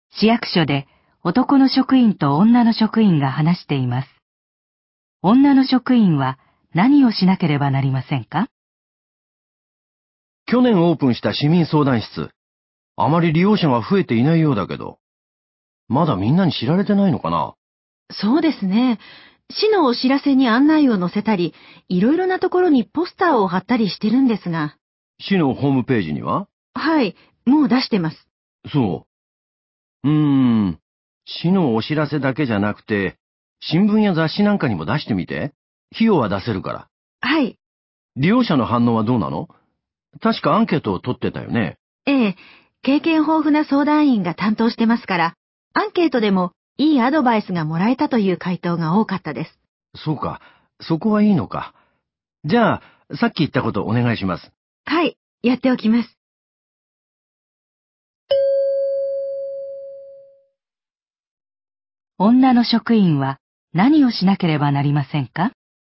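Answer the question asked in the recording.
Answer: 新聞や雑誌に市民相談室の案内を出す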